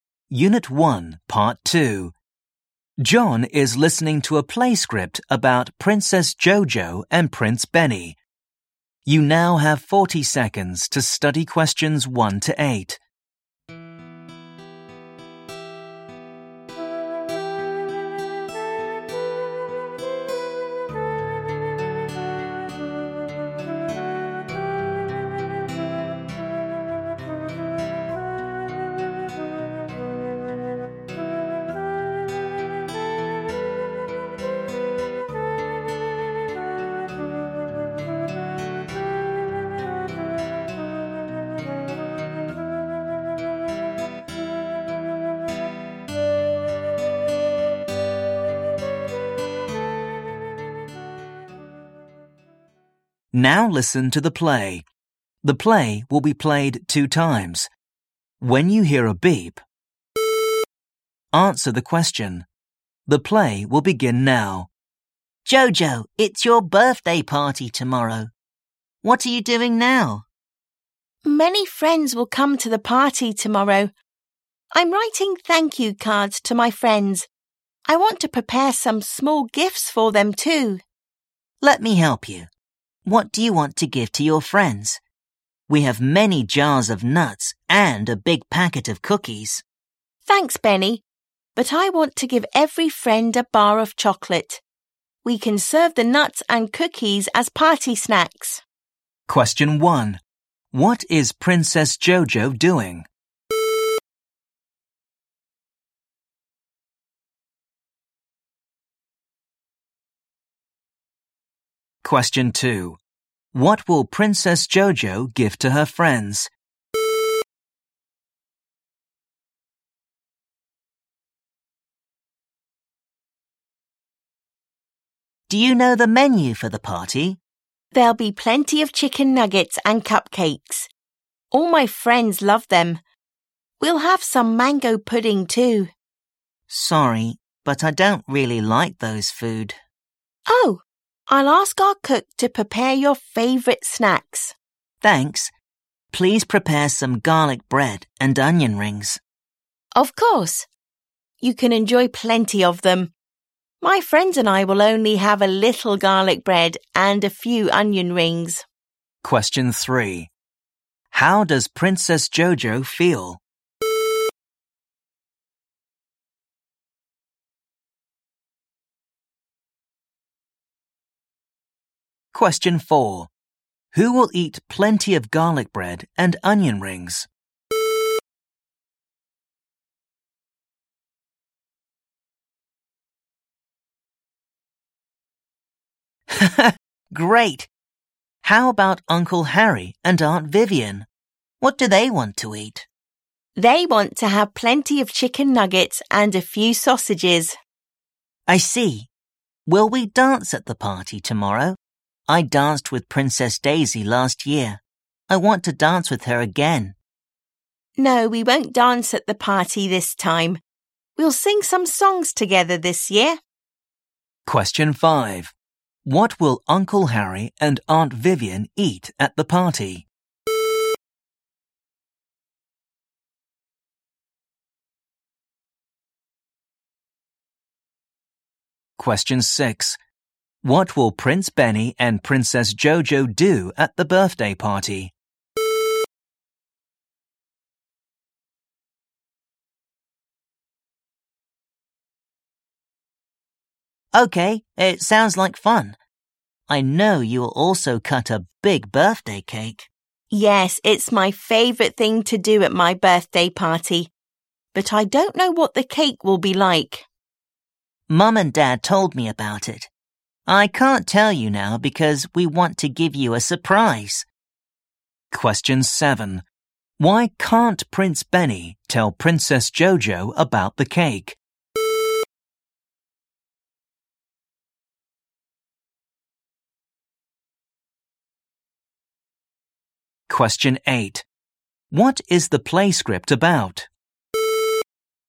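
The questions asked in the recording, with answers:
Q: What is Princess Jojo doing?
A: Writing thank you cards to her friends

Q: What will Princess Jojo give to her friends?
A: A bar of chocolate each

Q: Who will eat plenty of garlic bread and onion rings?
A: Prince Benny

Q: What will Uncle Harry and Aunt Vivian eat at the party?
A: Plenty of chicken nuggets and a few sausages

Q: What will Prince Benny and Princess Jojo do at the birthday party?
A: Sing some songs together

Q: Why can't Prince Benny tell Princess Jojo about the cake?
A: Because they want to give her a surprise

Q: What is the play script about?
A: Princess Jojo's birthday party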